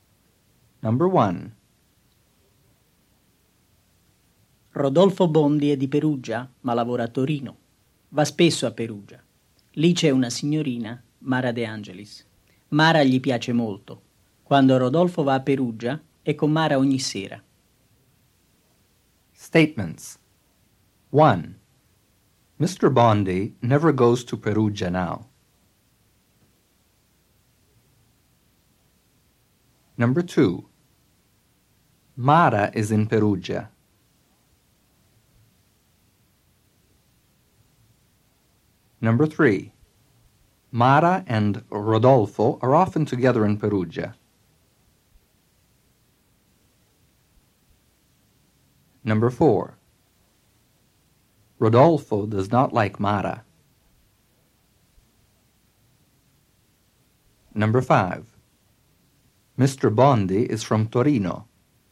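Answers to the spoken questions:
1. False
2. True
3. True
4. False
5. False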